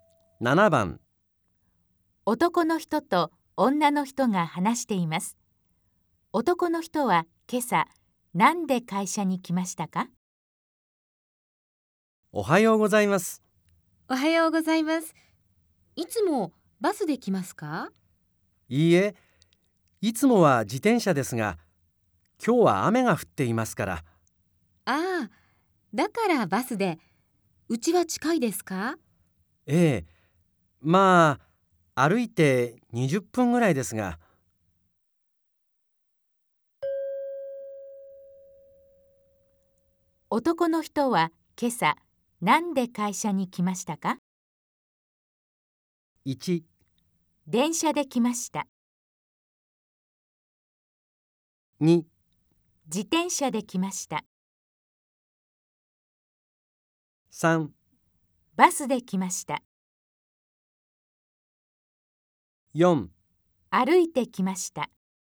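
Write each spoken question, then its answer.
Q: 男の人は今朝何で会社に来ましたか?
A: 3: バスで来ました。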